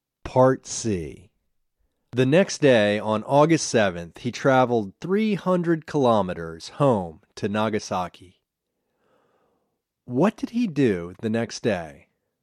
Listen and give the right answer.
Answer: The next day, he traveled 300 kilometers home to Nagasaki.